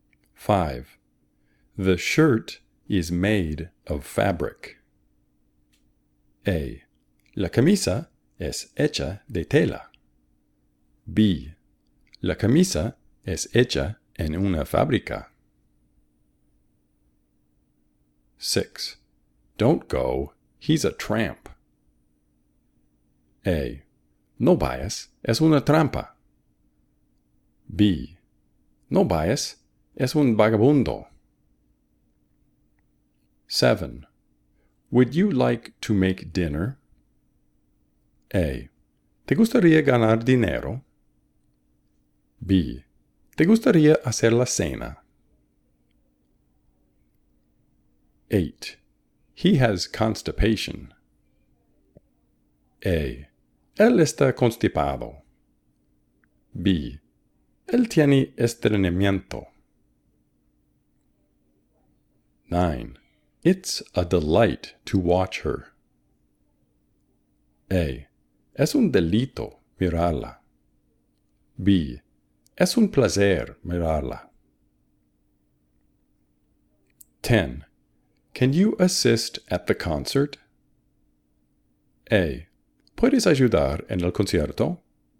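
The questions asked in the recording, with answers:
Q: The shirt is made of fabric.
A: A: La camisa es hecha de tela.

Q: Don't go, he's a tramp.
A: B: No bias es un vagabundo.

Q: Would you like to make dinner?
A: B: ¿Te gustaría hacer la cena?

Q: He has constipation.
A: B: Él tiene estreñimiento.

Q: It's a delight to watch her.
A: B: Es un placer mirarla.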